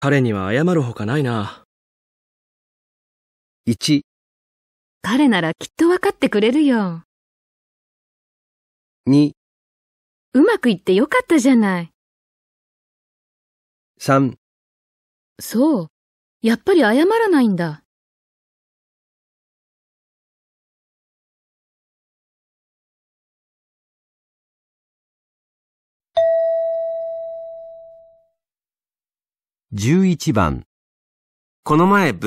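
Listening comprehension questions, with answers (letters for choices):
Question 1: 男: 僕のせいであんな結果になってしまって...彼には謝るほかないな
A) 彼ならきっとわかってくれるよ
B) うまくいってよかったじゃない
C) そう。やっぱり謝らないんだ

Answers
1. A

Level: 【N2 第2回】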